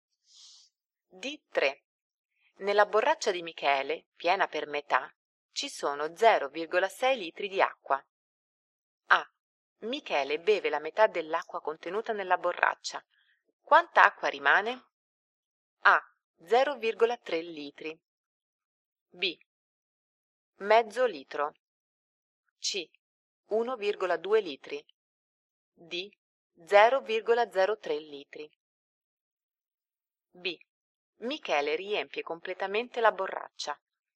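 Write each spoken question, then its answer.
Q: Quanta acqua rimane?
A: A: 0,3 litri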